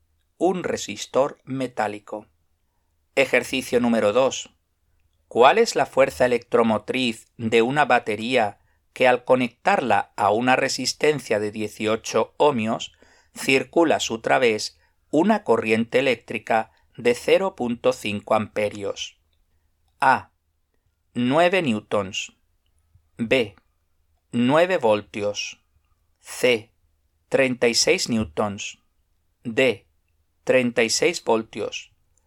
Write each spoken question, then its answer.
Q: ¿Cuál es la fuerza electromotriz de una batería que al conectarla a una resistencia de 18 ohmios circula a su través una corriente eléctrica de 0.5 amperios?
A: La respuesta correcta es es la B, 9 voltios.